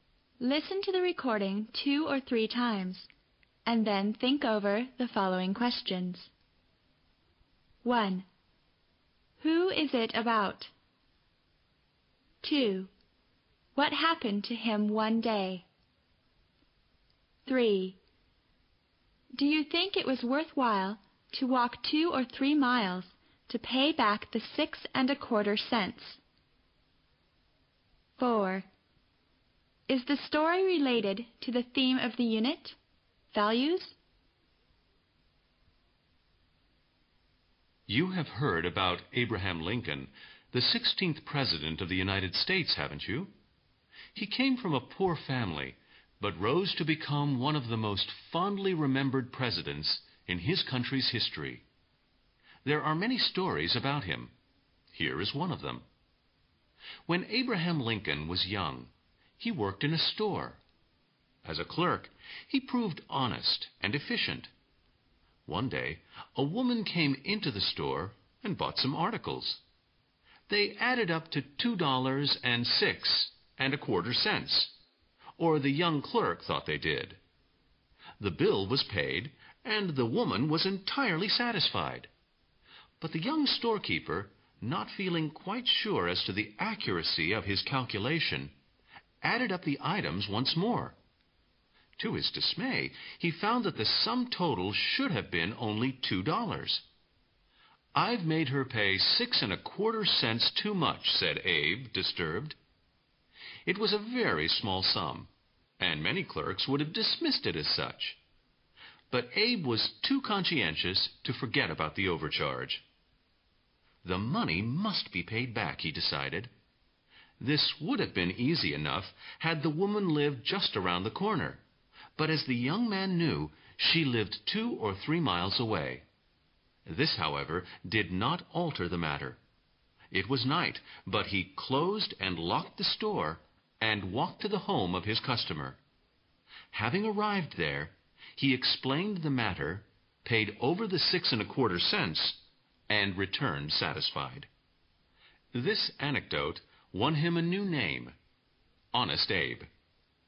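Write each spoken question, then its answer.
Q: Who is it about?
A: Abraham Lincoln, as a young store clerk

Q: What happened to him one day?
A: He overcharged a woman 61⁄4 cents, so he closed the store at night and walked 2 or 3 miles to her home to pay it back.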